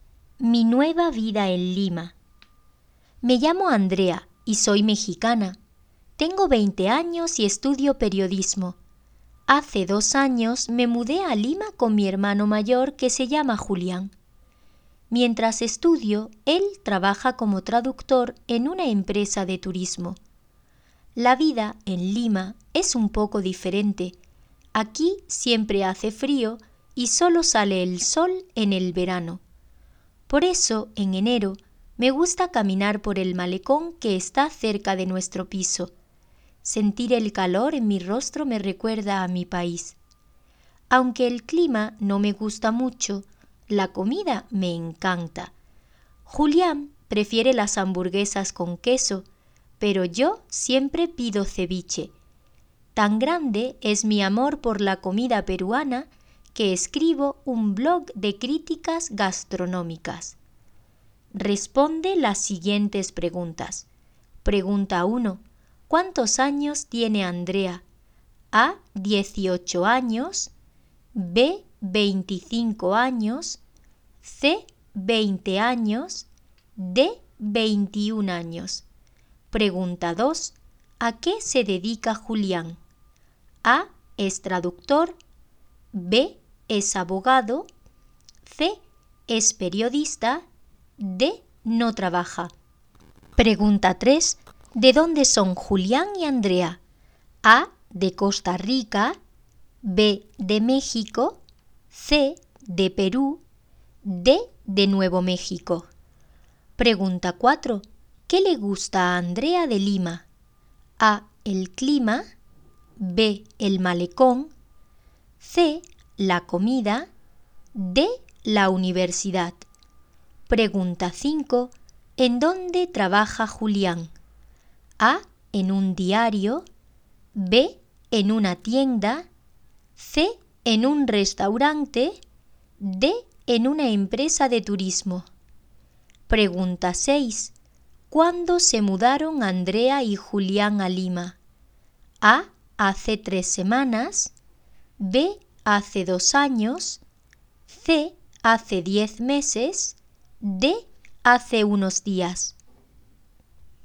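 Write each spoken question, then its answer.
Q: ¿Cuántos años tiene Andrea?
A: C: 20 años

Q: ¿A qué se dedica Julián?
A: A: Es traductor

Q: ¿De dónde son Julián y Andrea?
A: B: De México

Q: ¿Qué le gusta a Andrea de Lima?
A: C: La comida

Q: ¿En dónde trabaja Julián?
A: D: En una empresa de turismo

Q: ¿Cuándo se mudaron Andrea y Julián a Lima?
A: B: Hace 2 años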